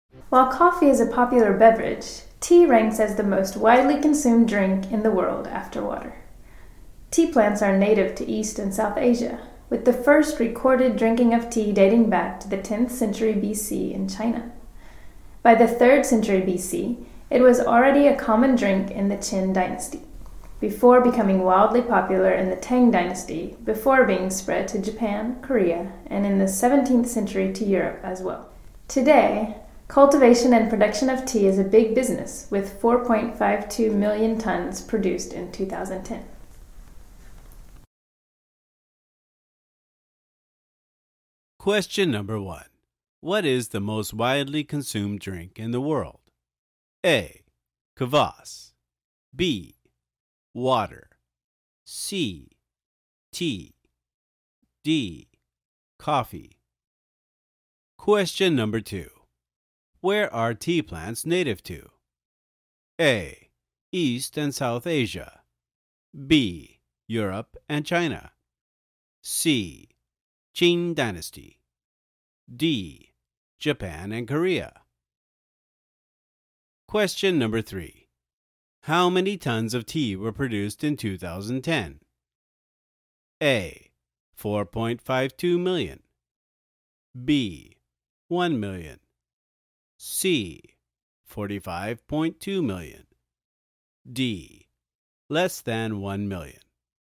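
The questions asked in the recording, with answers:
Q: What is the most widely consumed drink in the world?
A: B: Water

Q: Where are tea plants native to?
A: A: East and South Asia

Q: How many tons of tea were produced in 2010?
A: A: 4.52 million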